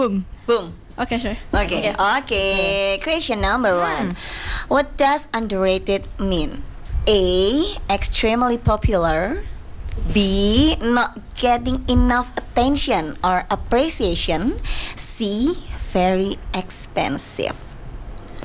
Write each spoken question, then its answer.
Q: What does underrated mean?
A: Appreciation.